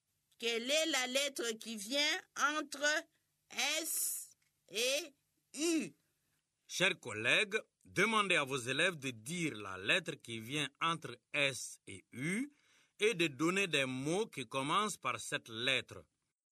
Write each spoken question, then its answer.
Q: Quelle est la lettre qui vient entre S et U?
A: Monsieur, c'est la lettre T.